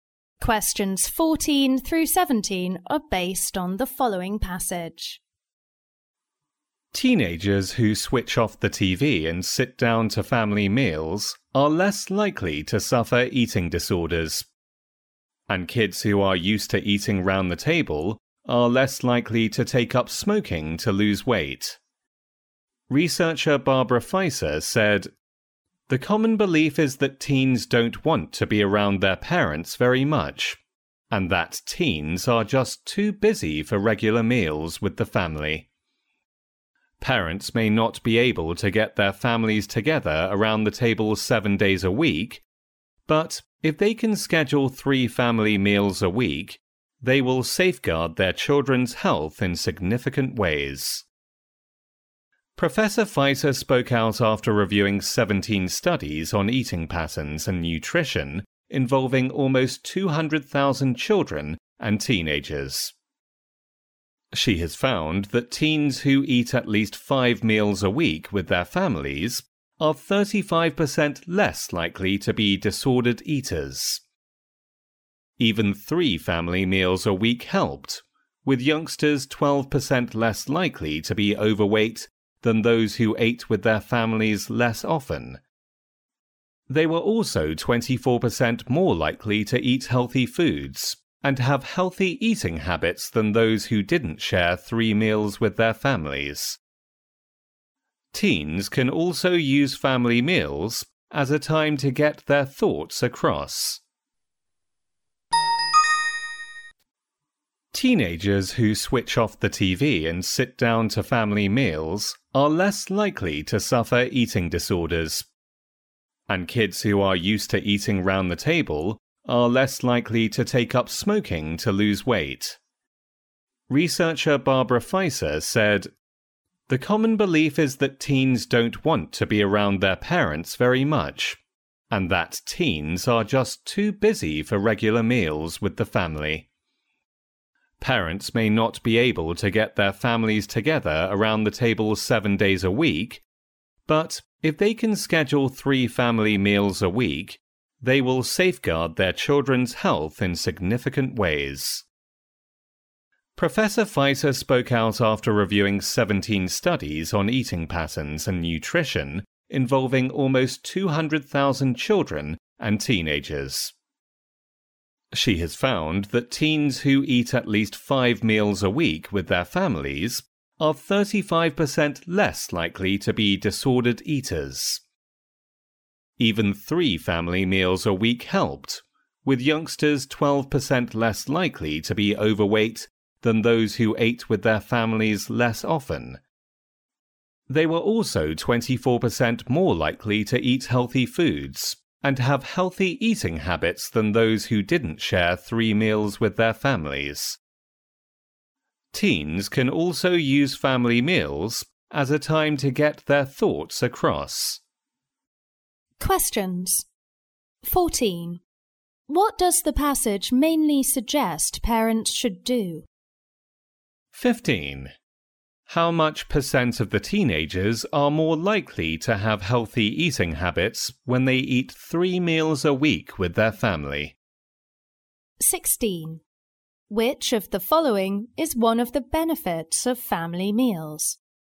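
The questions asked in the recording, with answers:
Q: How much percent of the teenagers are more likely to have healthy eating habits when they eat 3 meals a week with their family?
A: 24%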